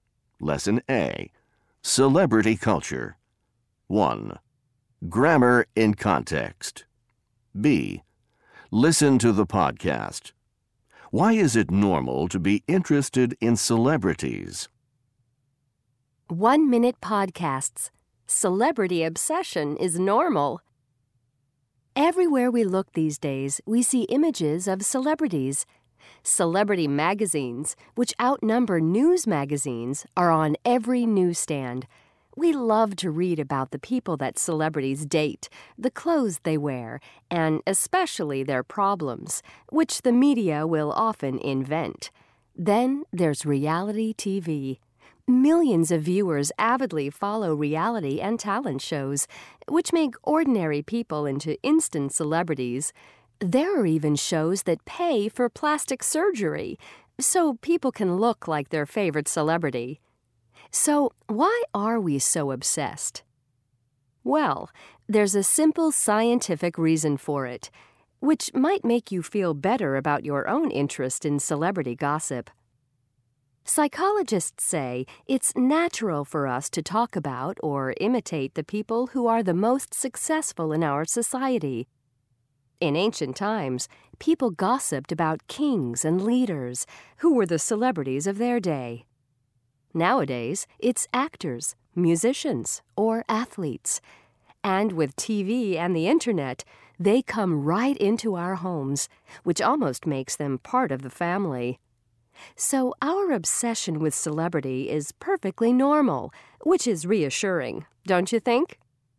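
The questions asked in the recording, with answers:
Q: Why is it normal to be interested in celebrities?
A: It's natural to talk about or imitate the most successful people in our society.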